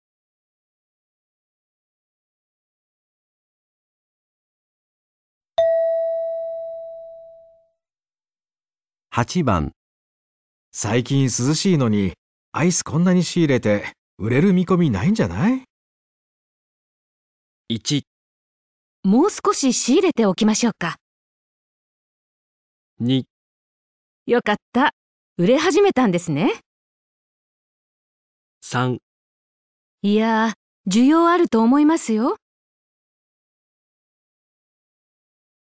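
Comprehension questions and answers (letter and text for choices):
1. 最近涼しいのにアイスこんなに仕入れて売れる見込み無いんじゃない?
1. もう少し仕入れておきましょうか?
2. よかった。 増え始めたんですね。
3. いやぁ、需要あると思いますよ。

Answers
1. 3. いやぁ、需要あると思いますよ。

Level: 【N1 第1回】聴解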